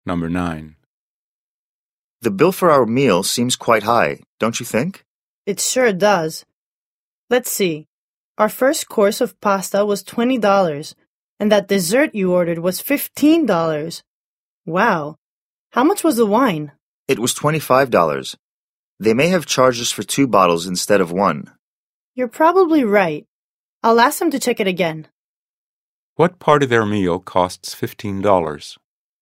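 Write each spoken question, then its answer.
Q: What part of their meal costs $15?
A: The dessert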